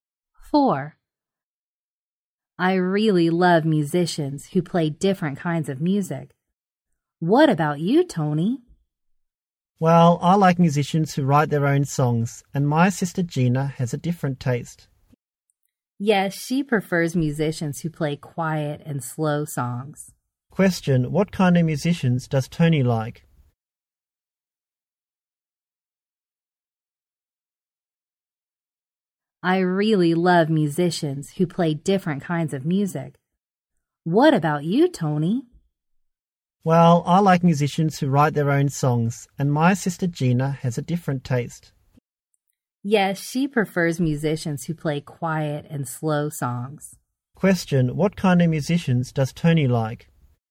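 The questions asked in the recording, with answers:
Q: what kind of musicians does Tony like?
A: Musicians who write their own songs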